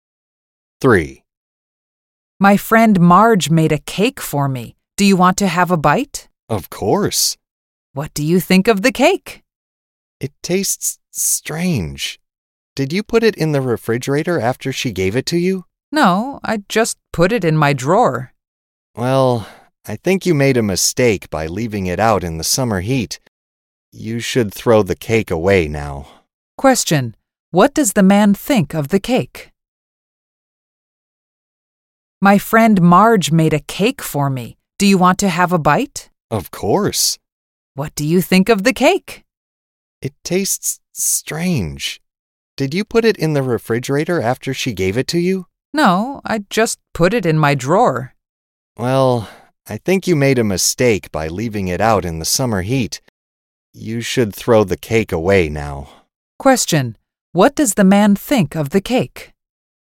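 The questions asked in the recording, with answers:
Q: What does the man think of the cake?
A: It tastes strange; it went bad in the heat and should be thrown away.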